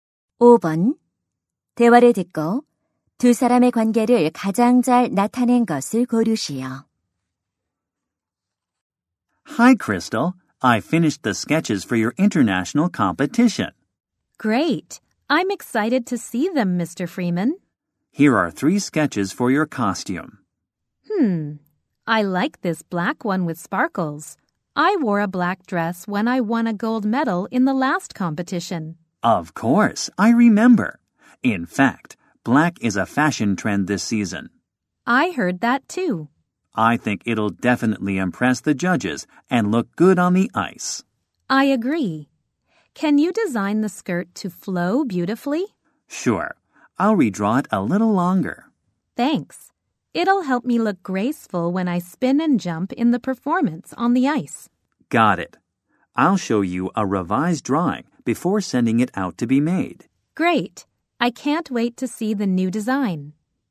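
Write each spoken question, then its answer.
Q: 대화를 듣고 두 사람의 관계를 가장 잘 나타낸 것을 고르시오.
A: 의상 디자이너 - 피겨 스케이팅 선수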